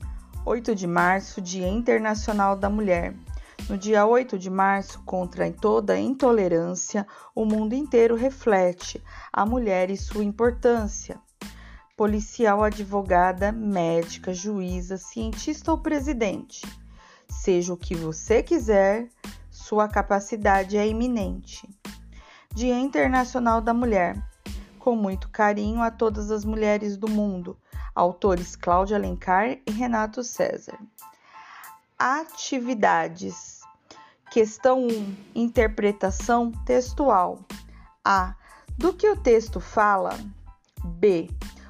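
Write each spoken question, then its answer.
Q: Do que o texto fala?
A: Do Dia Internacional da Mulher e da importância da mulher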